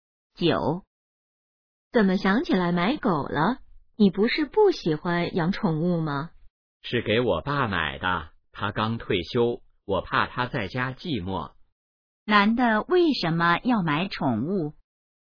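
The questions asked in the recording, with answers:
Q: 男的为什么要买宠物?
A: 怕刚退休的爸爸在家寂寞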